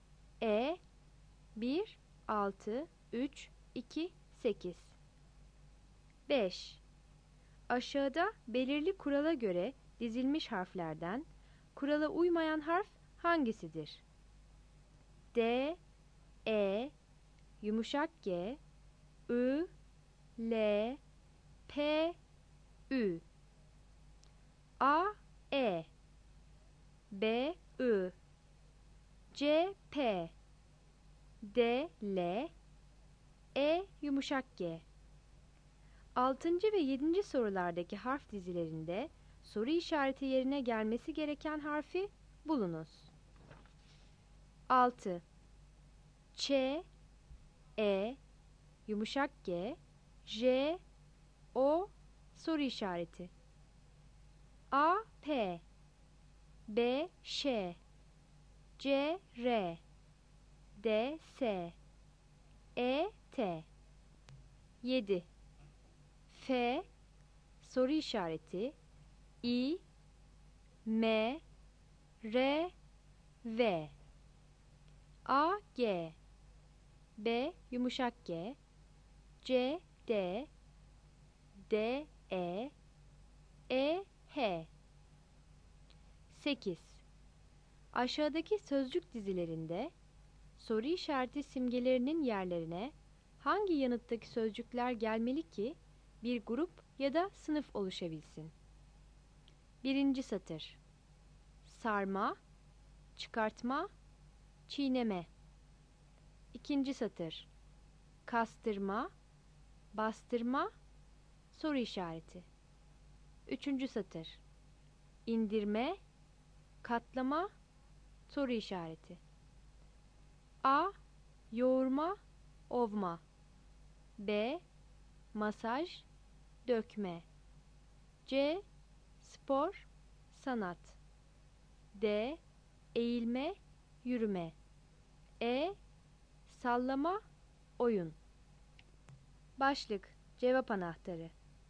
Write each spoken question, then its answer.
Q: Ç, E, yumuşak G, J, O, soru işareti.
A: 6. E.

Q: F, soru işareti, İ, M, R, V.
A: 7. B.

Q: Aşağıdaki sözcük dizilerinde soru işareti simgelerinin yerlerine hangi yanıttaki sözcükler gelmeli ki bir grup ya da sınıf oluşabilsin?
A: 8. A.